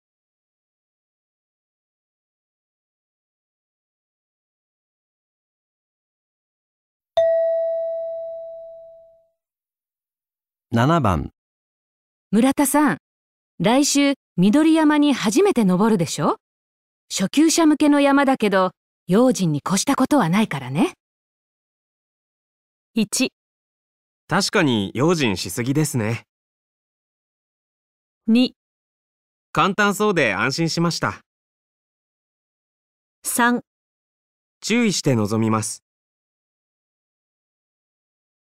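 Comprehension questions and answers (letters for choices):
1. 村田さん。 来週緑山に初めて登るでしょ? 初級者向けの山だけど用心に越したことはないからね。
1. 確かに用心し過ぎですね。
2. 簡単そうで安心しました。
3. 注意して臨みます。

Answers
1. 3

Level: 【N1 第1回】聴解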